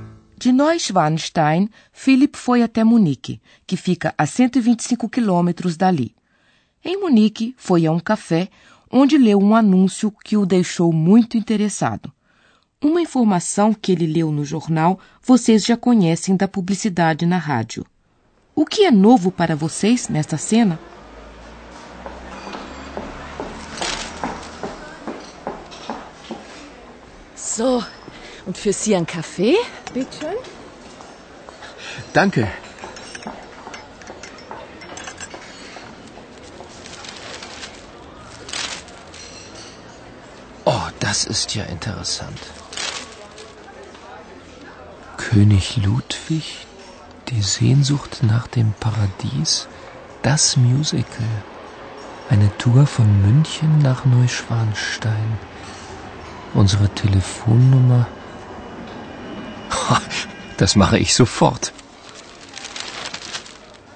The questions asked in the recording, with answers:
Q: O que é novo para vocês nesta cena?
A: A nova informação é que há uma excursão de Munique para o castelo de Neuschwanstein.